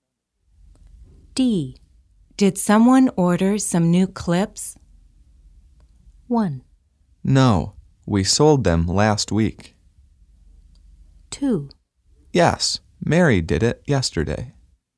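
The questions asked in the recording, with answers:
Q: Did someone order some new clips?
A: 2: Yes, Mary did it yesterday.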